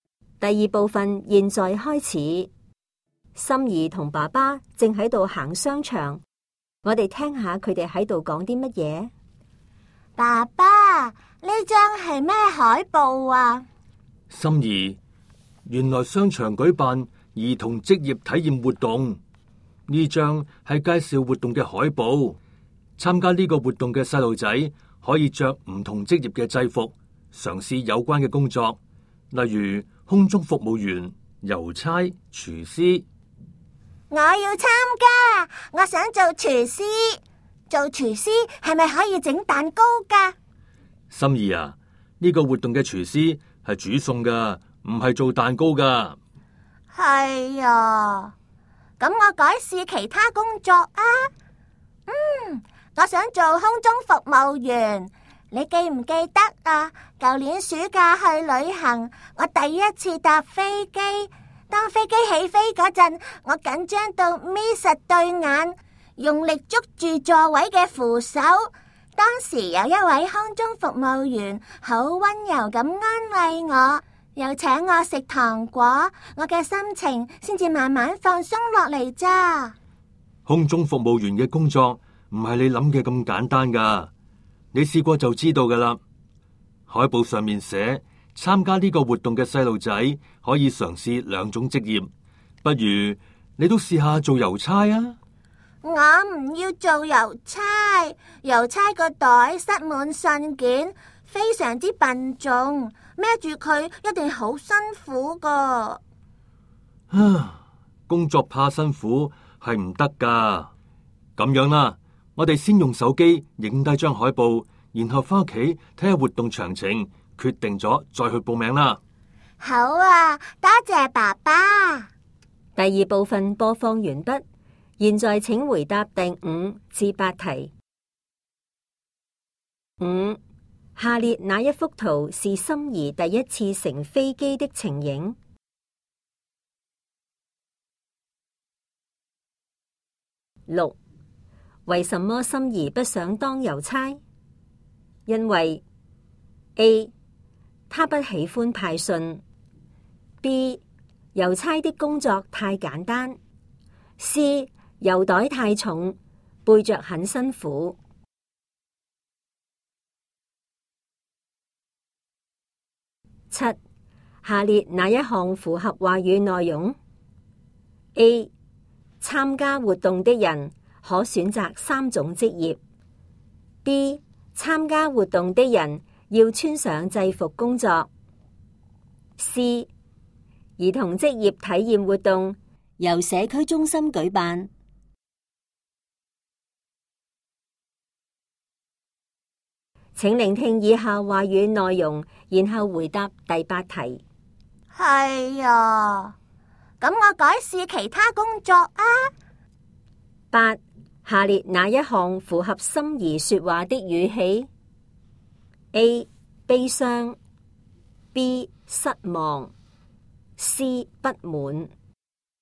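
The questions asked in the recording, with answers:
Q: 六,为什么心怡不想当邮差?因为 A, 他不喜欢派信。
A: C: 邮袋太重,背着很辛苦

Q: 七,下列哪一项符合话语内容?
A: B: 参加活动的人要穿上制服工作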